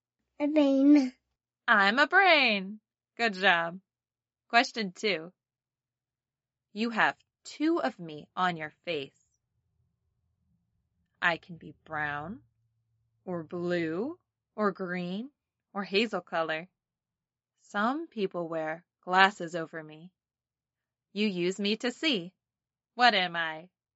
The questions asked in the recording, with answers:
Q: You use me to see. What am I?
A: Eyes.